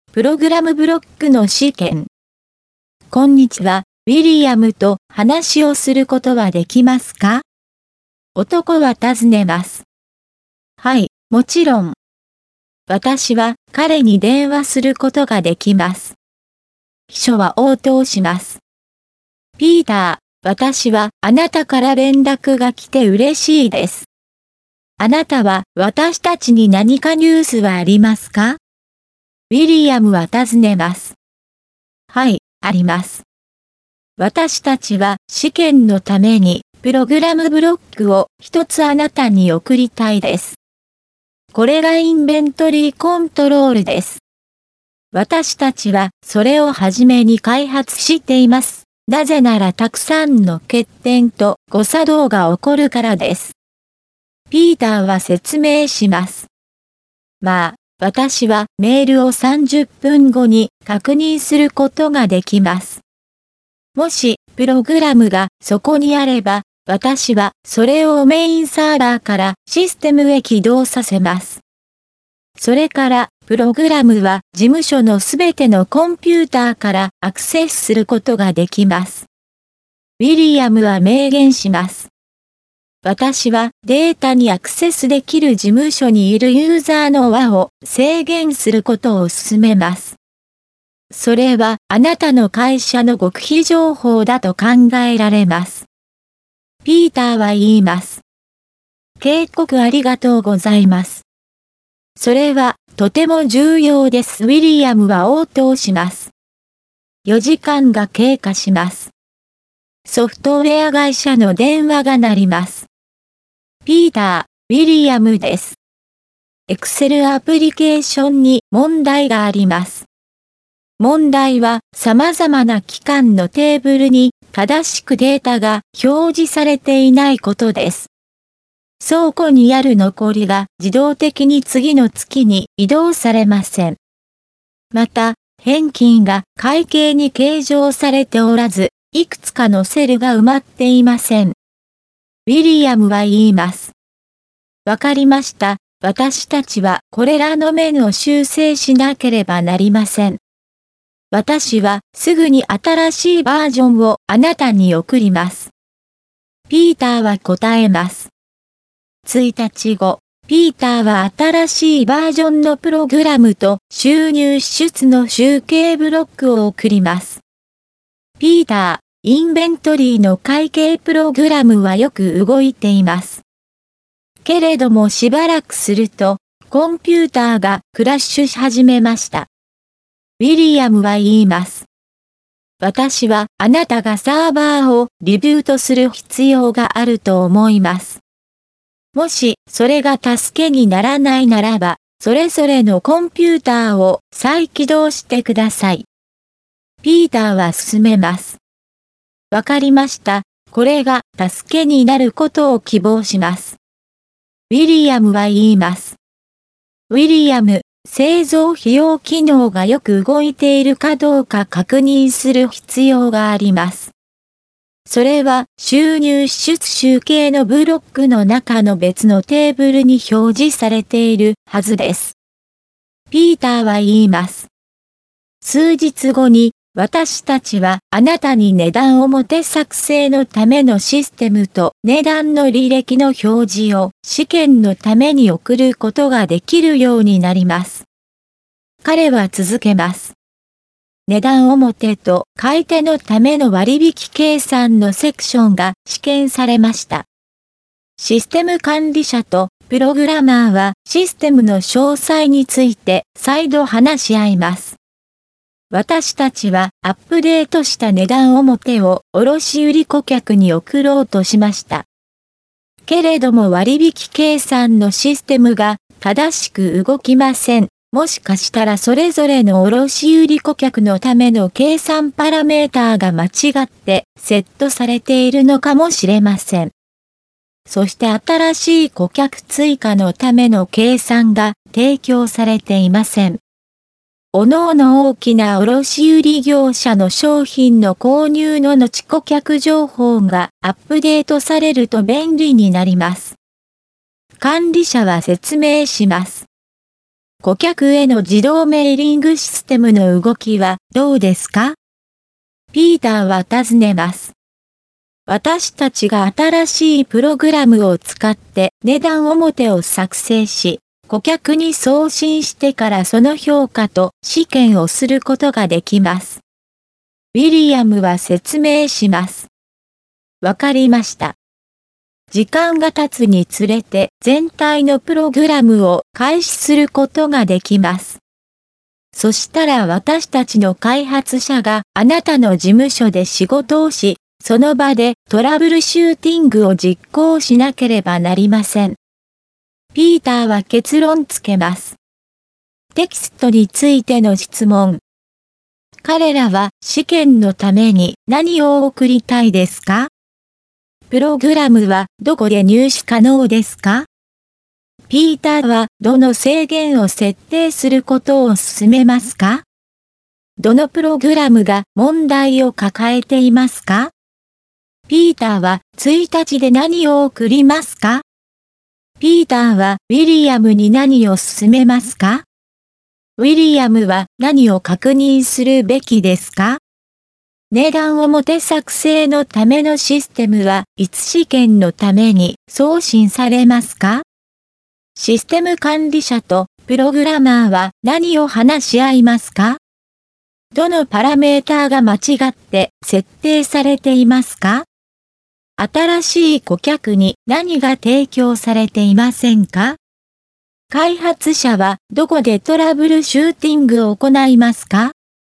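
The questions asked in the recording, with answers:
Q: 彼らは試験のために何を送りたいですか?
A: プログラムブロック(インベントリーコントロール)

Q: プログラムはどこで入手可能ですか?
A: 事務所のすべてのコンピューター

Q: ピーターはどの制限を設定することを勧めますか?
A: データにアクセスできるユーザーの輪を制限すること

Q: どのプログラムが問題を抱えていますか?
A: Excel アプリケーション

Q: ピーターは1日で何を送りますか?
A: 新しいバージョンのプログラムと収入支出の集計ブロック

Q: ピーターはウィリアムに何を勧めますか?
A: サーバーをリブートすること(だめなら各コンピューターを再起動)

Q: ウィリアムは何を確認するべきですか?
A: 製造費用機能がよく動いているかどうか

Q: 値段表作成のためのシステムはいつ試験のために送信されますか?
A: 数日後

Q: システム管理者とプログラマーは何を話し合いますか?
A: システムの詳細

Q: どのパラメーターが間違って設定されていますか?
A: それぞれの卸売顧客のための計算パラメーター

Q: 新しい顧客に何が提供されていませんか?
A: 新しい顧客追加のための計算

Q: 開発者はどこでトラブルシューティングを行いますか?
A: ウィリアムの事務所で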